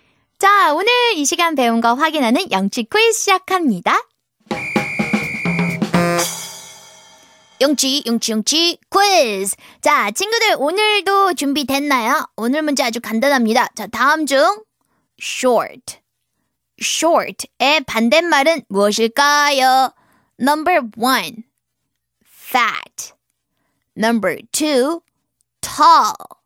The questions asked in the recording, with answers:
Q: 자, 다음 중 short. Short의 반대말은 무엇일까요?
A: 정답 2번이네요.